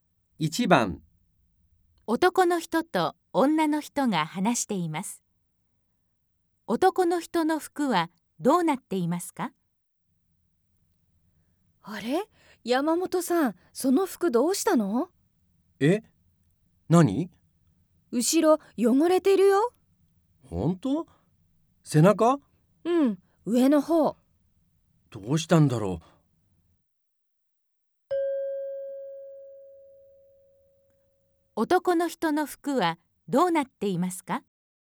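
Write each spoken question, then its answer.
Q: 男の人の服はどうなっていますか?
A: 背中の上の方が汚れている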